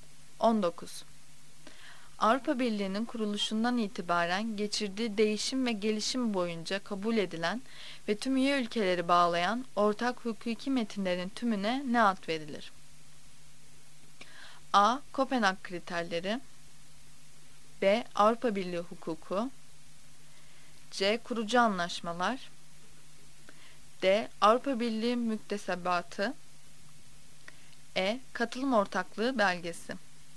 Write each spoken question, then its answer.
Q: Avrupa Birliği'nin kuruluşundan itibaren geçirdiği değişim ve gelişim boyunca kabul edilen ve tüm üye ülkeleri bağlayan ortak hukuki metinlerin tümüne ne ad verilir?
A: Cevap D. Avrupa Birliği müktesebatı.